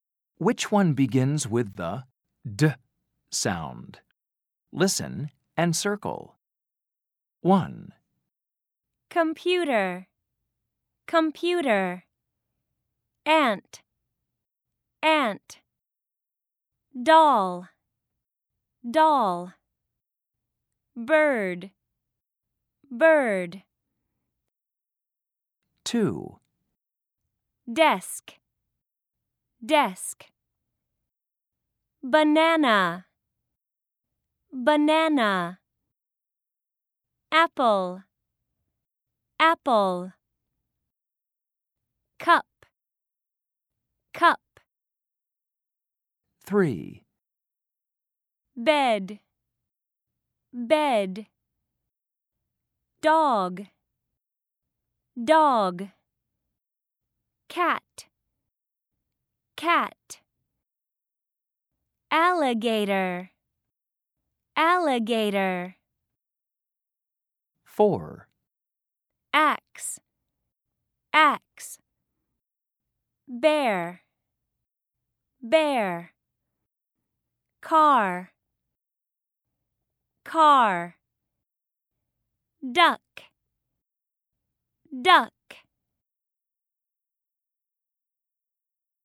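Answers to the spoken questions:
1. Doll
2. Desk
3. Dog
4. Duck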